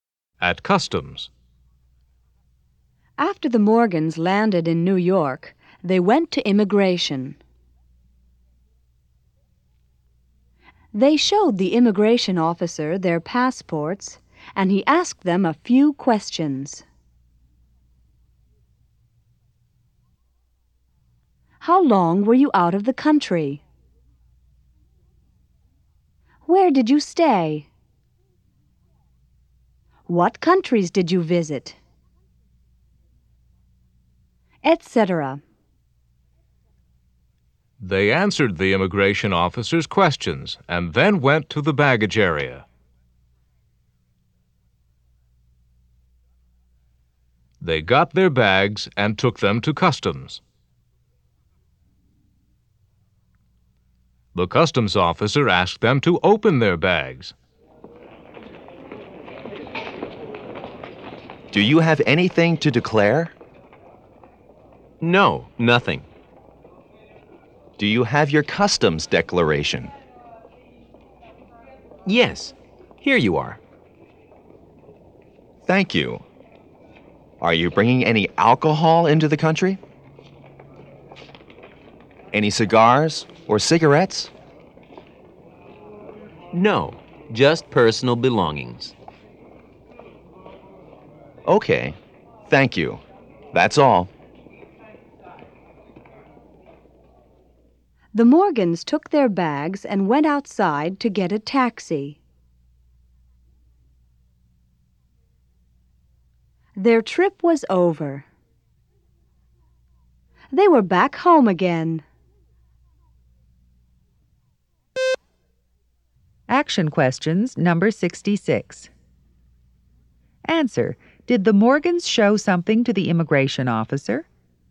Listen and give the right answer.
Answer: Yes, they did.